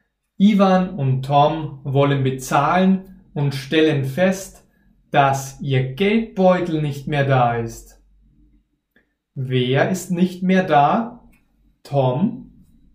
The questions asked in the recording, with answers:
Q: Wer ist nicht mehr da? Tom?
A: Nein, Tom ist noch da. Aber der Geldbeutel von Ivan und Tom ist nicht mehr da.